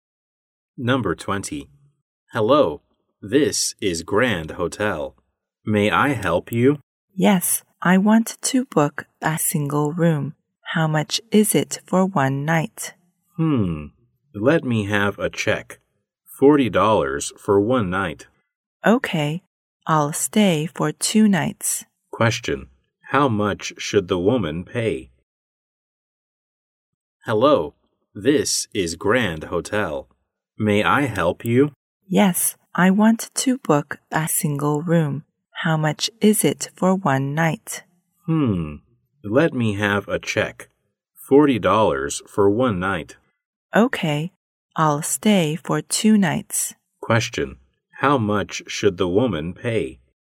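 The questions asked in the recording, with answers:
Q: how much should the woman pay?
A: $80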